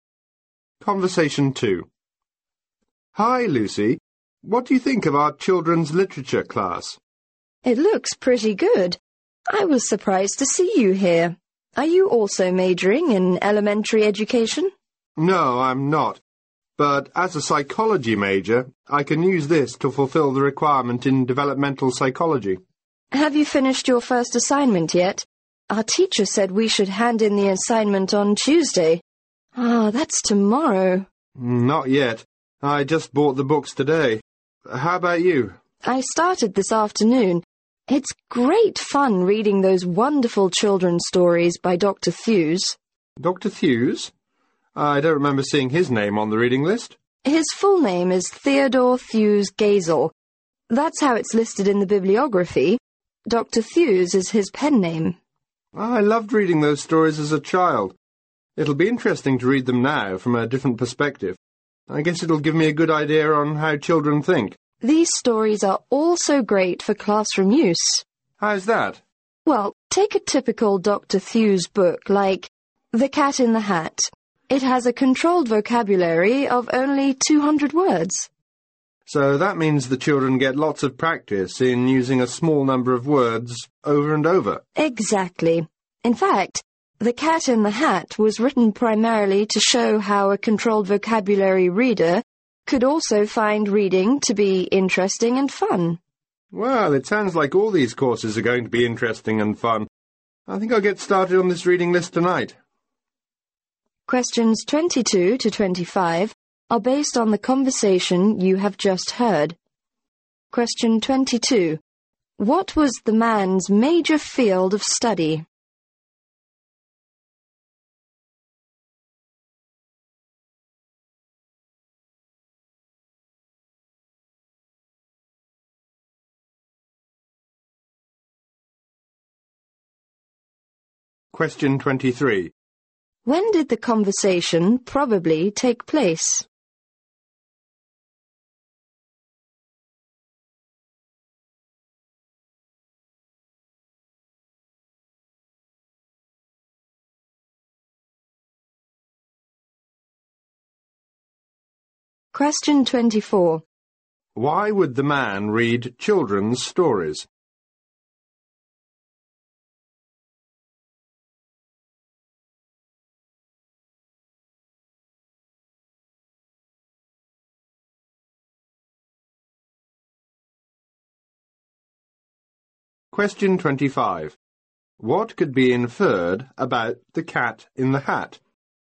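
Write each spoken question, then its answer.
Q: What was the man's major field of study?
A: Psychology

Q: When did the conversation probably take place?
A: On Monday

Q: Why would the man read children's stories?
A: To fulfill the developmental psychology requirement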